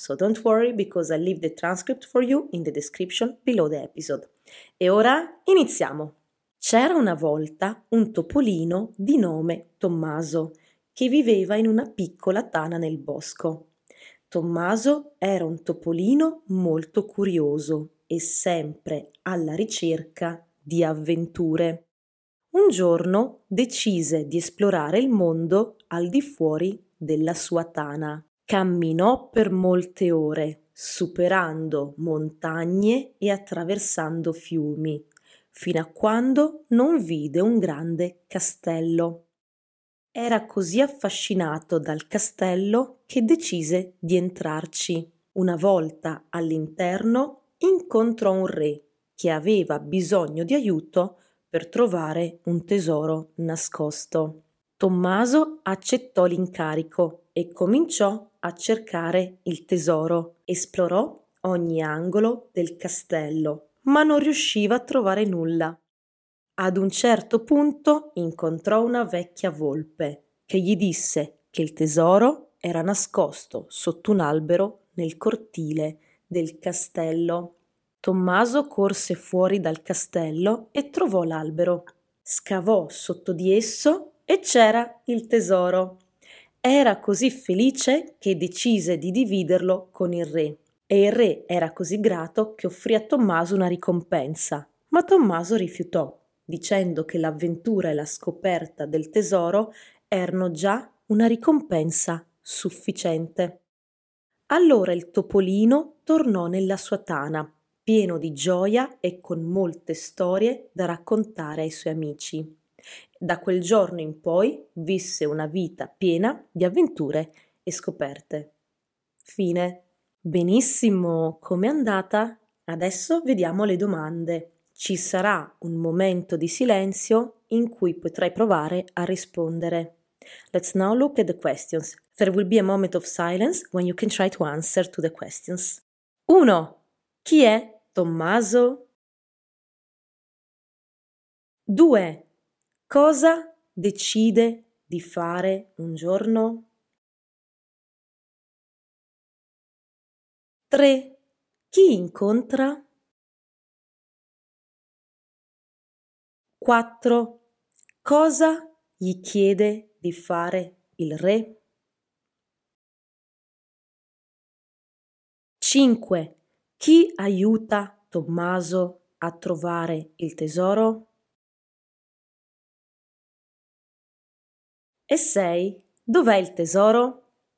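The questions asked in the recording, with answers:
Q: Chi è Tommaso?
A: Un topolino curioso che vive in una tana nel bosco

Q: Cosa decide di fare un giorno?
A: Esplorare il mondo fuori dalla sua tana

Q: Cosa gli chiede di fare il re?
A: Aiutarlo a trovare un tesoro nascosto

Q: Chi aiuta Tommaso a trovare il tesoro?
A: Una vecchia volpe

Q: Dov'è il tesoro?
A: Sotto un albero nel cortile del castello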